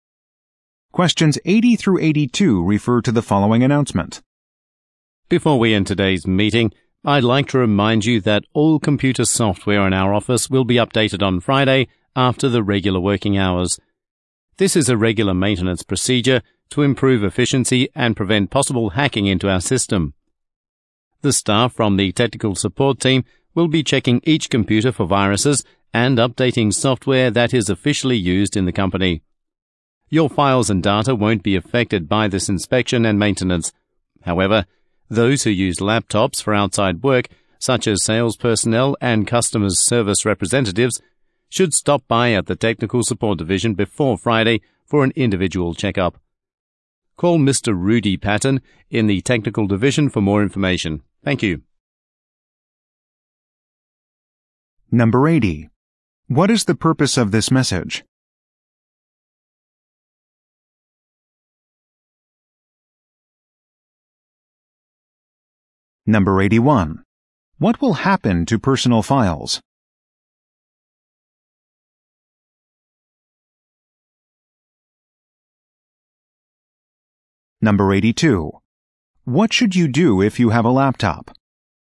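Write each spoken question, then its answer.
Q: What is the purpose of this message?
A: To announce that office computer software will be updated on Friday

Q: What will happen to personal files?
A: They won't be affected

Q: What should you do if you have a laptop?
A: Stop by the Technical Support Division before Friday for a checkup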